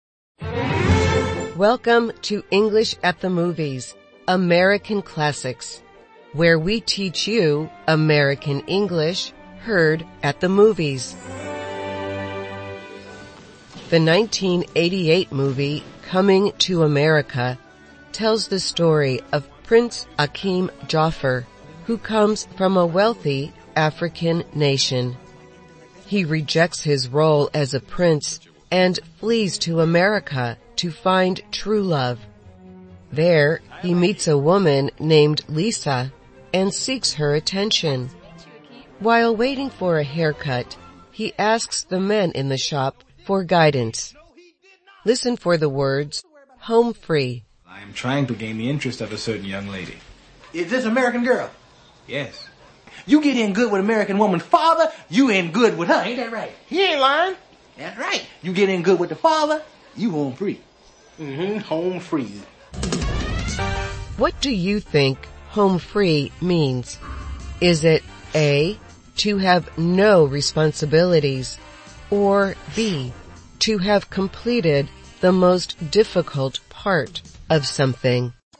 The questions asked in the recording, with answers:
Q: What do you think home free means?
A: The answer is B, to have completed the most difficult part of something.